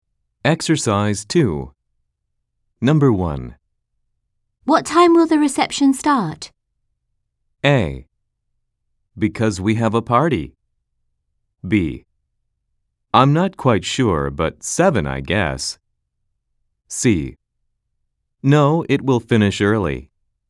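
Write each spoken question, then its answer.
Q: What time will the reception start?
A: B: I'm not quite sure, but 7, I guess.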